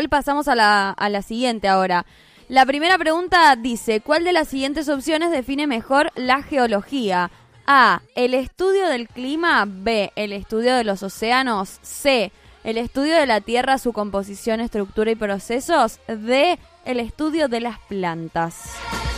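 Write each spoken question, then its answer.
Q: ¿cuál de las siguientes opciones define mejor la geología?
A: C: el estudio de la tierra, su composición, estructura y procesos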